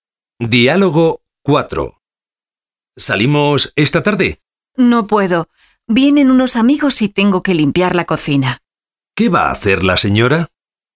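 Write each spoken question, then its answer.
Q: ¿Qué va a hacer la señora?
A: Limpiar la cocina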